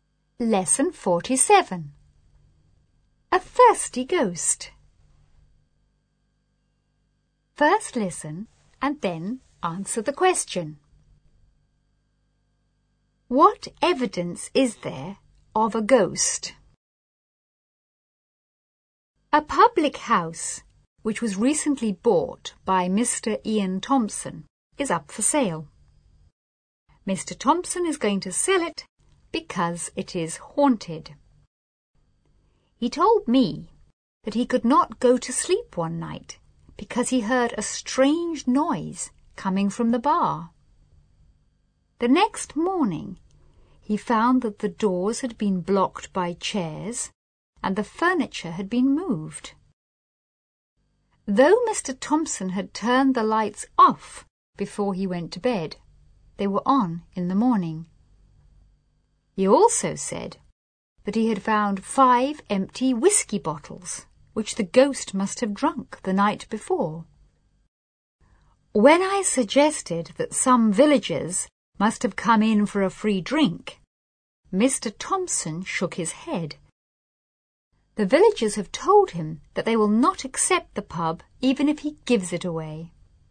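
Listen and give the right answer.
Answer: Strange noises from the bar, doors blocked by chairs, furniture moved, lights turned on, and five empty whisky bottles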